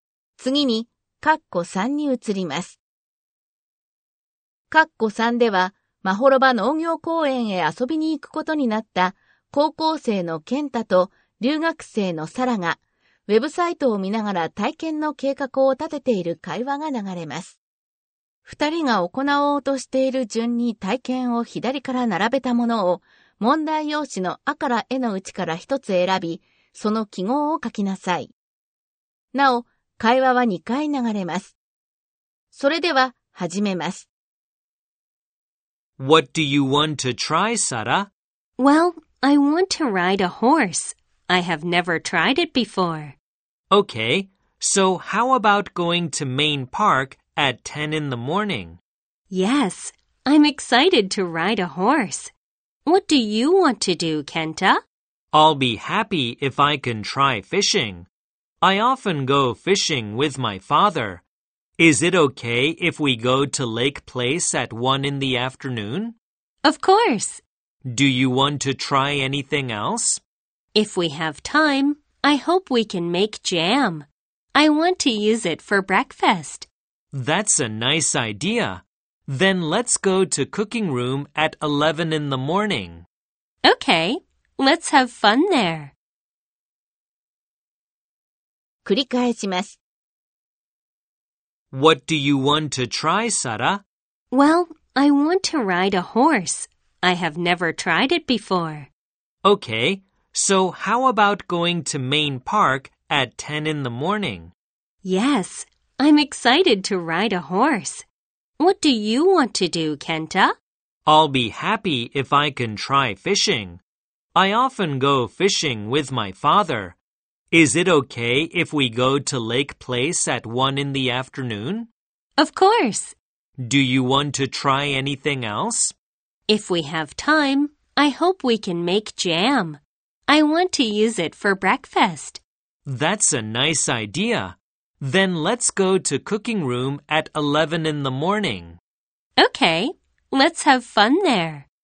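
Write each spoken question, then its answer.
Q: 二人が行おうとしている順に体験を左から並べたものを問題用紙のあからえのうちから一つ選び、その記号を書きなさい。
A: 乗馬(10時)→ジャム作り(11時)→釣り(午後1時)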